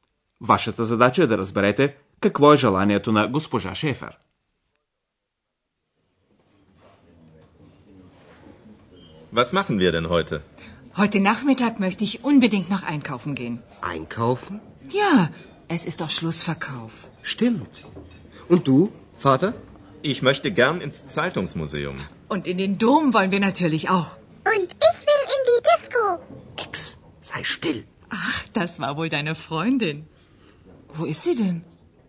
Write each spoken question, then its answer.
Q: Вашата задача е да разберете какво е желанието на госпожа Шефер.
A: Госпожа Шефер иска да отиде по магазините.